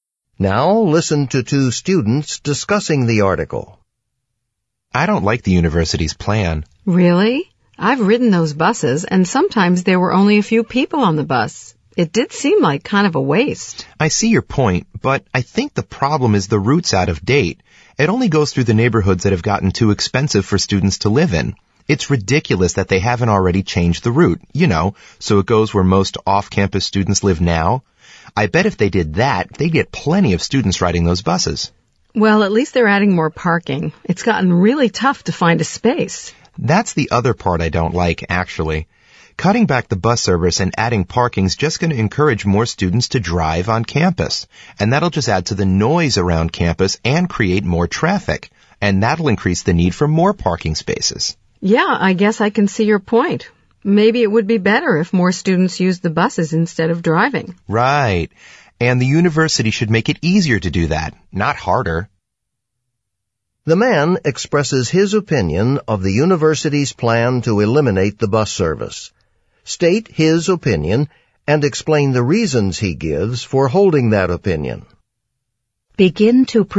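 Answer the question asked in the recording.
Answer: He disagrees with the plan. Buses are empty only because the route is out of date; it should go where off-campus students live now. Cutting buses and adding parking will make more students drive, which adds noise and traffic and creates a need for even more parking.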